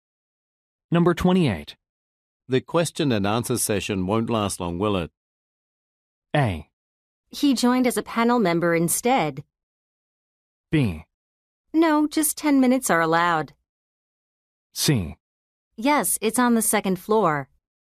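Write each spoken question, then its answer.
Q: The question and answer session won't last long, will it?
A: B: No, just 10 minutes are allowed.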